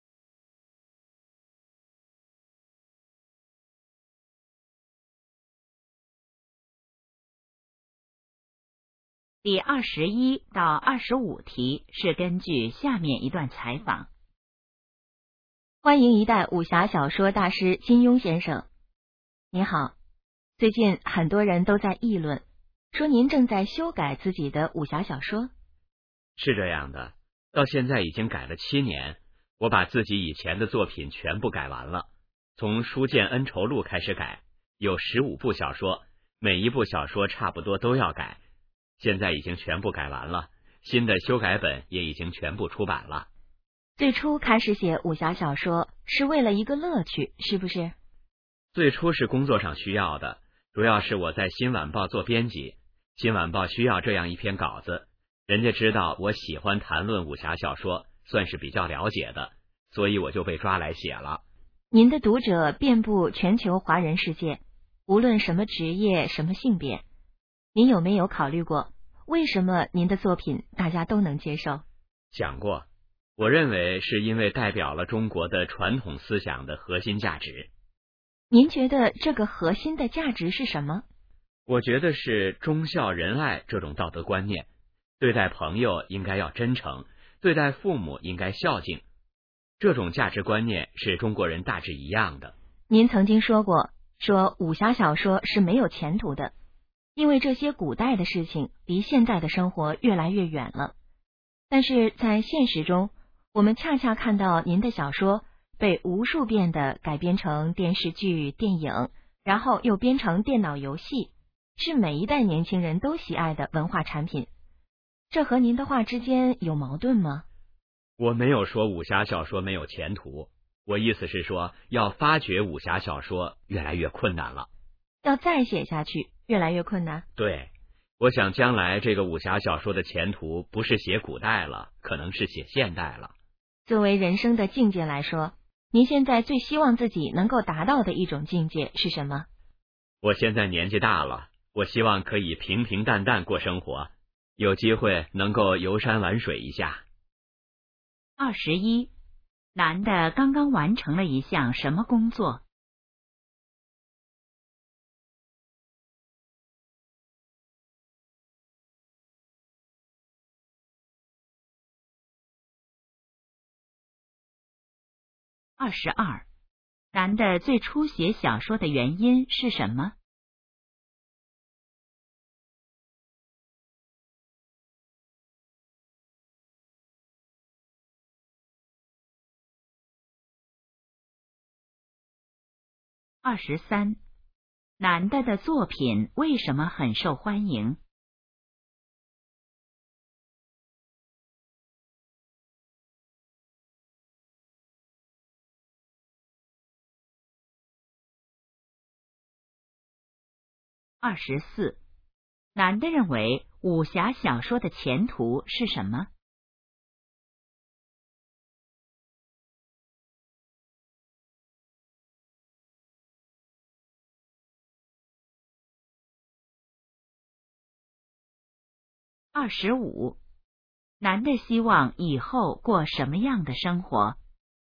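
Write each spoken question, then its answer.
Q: 男的刚刚完成了一项什么工作?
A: 修改自己以前的武侠小说

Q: 男的最初写小说的原因是什么?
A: 工作需要,新晚报需要稿子

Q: 男的的作品为什么很受欢迎?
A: 代表了中国传统思想的核心价值

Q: 男的认为武侠小说的前途是什么?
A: 可能是写现代

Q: 男的希望以后过什么样的生活?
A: 平平淡淡,游山玩水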